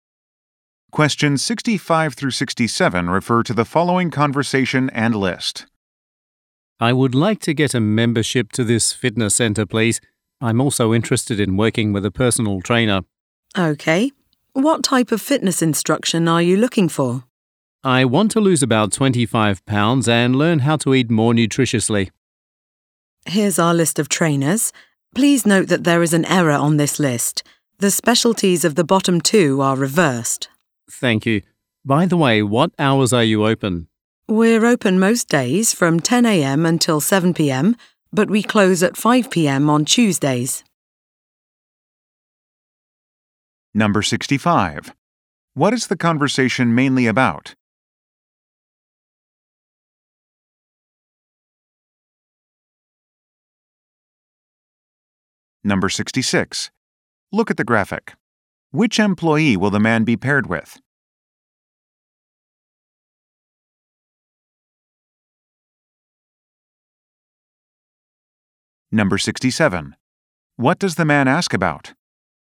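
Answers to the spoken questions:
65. Joining a fitness center with a personal trainer
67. Opening hours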